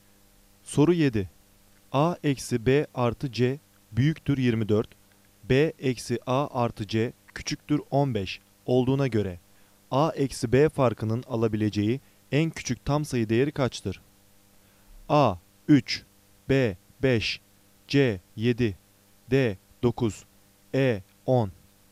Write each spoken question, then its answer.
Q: B eksi A artı C küçüktür 15 olduğuna göre A eksi B farkının alabileceği en küçük tam sayı değeri kaçtır?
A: Doğru cevap B. 5.